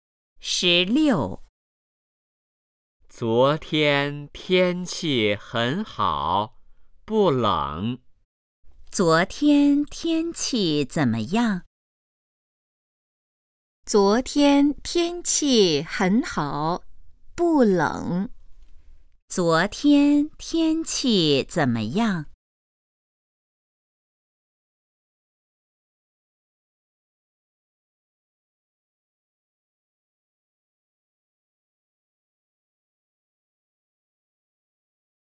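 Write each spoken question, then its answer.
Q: 昨天天气怎么样?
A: 很好,不冷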